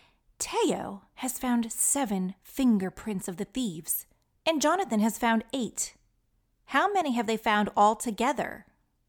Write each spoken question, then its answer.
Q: How many have they found all together?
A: That's right, 15, the number of the week.